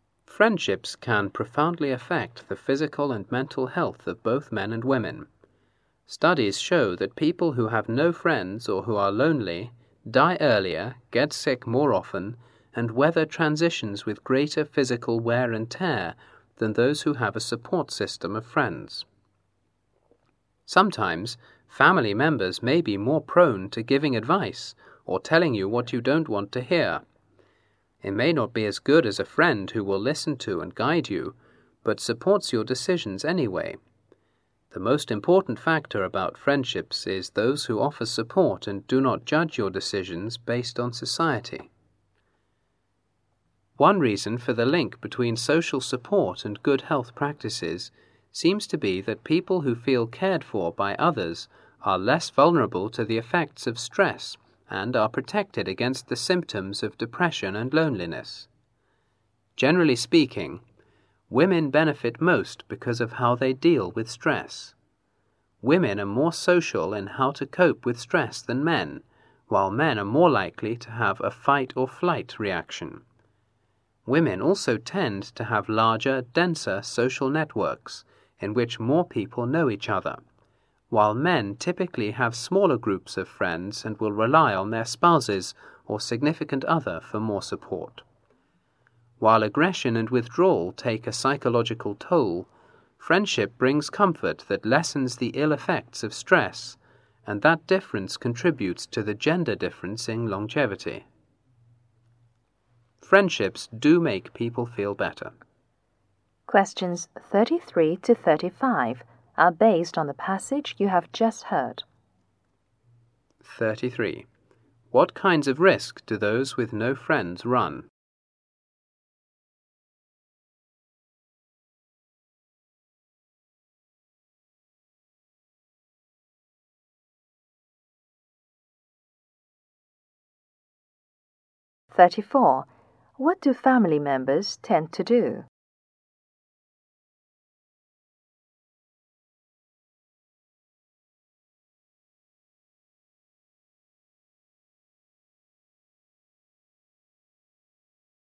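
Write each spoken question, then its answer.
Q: What kinds of risk do those with no friends run?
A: Dying earlier, getting sick more often and more physical wear and tear

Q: What do family members tend to do?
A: Give advice or tell you what you don't want to hear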